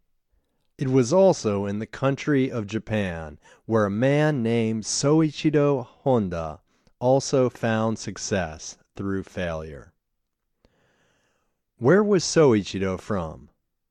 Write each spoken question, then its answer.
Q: Where was Soichiro from?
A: He was from Japan.